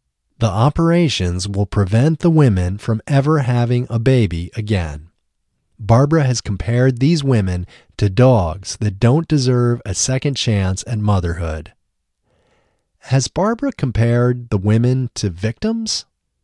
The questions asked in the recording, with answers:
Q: Has Barbara compared the women to victims?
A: No, Barbara hasn't compared the women to victims.